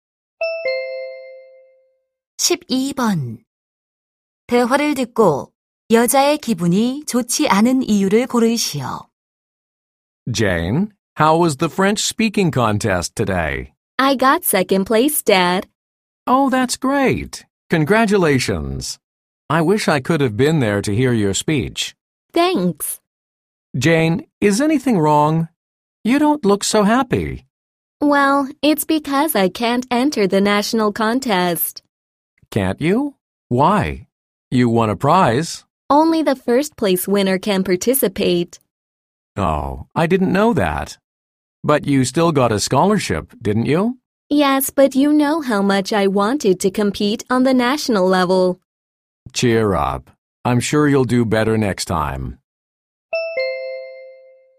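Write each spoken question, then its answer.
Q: 대화를 듣고 여자의 기분이 좋지 않은 이유를 고르시오.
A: 전국 대회에 참가할 수 없어서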